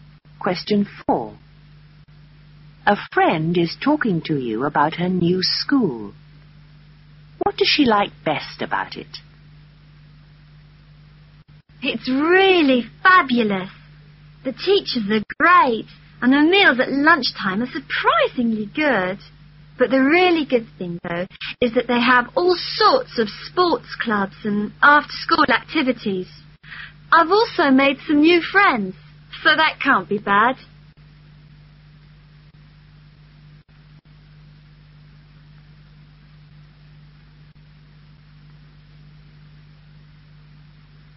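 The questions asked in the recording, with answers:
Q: What does she like best about it?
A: The sports clubs and after-school activities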